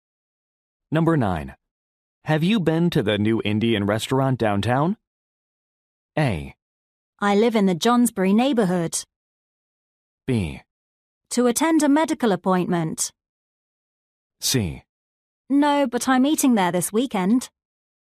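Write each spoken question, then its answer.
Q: Have you been to the new Indian restaurant downtown?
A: C: No, but I'm eating there this weekend.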